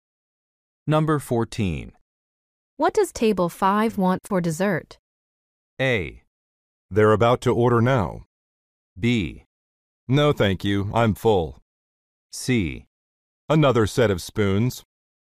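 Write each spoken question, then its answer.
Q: What does table 5 want for dessert?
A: A: They're about to order now.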